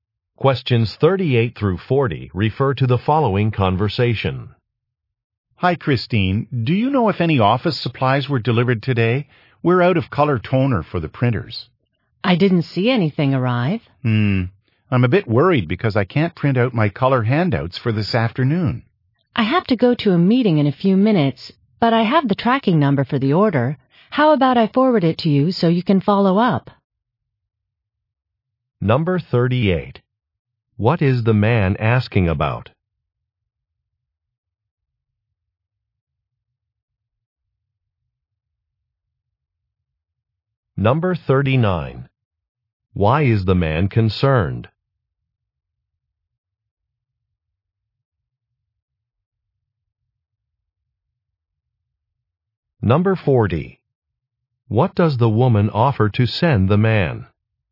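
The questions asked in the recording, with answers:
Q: What is the man asking about?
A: Whether office supplies were delivered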